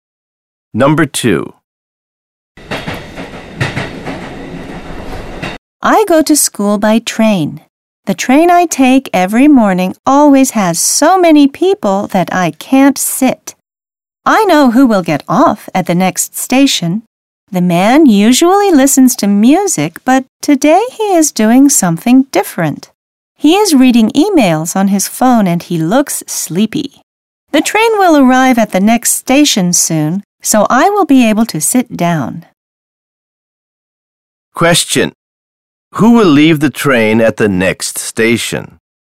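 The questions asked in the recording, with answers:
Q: Who will leave the train at the next station?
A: The sleepy man reading emails on his phone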